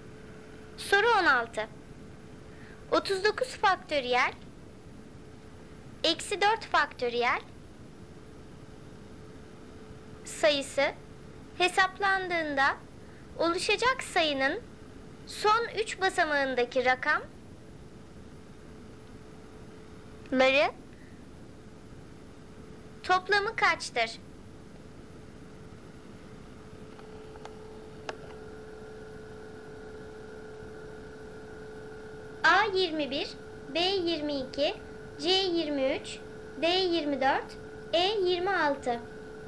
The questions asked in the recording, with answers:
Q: ları toplamı kaçtır?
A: Doğru cevap B 22.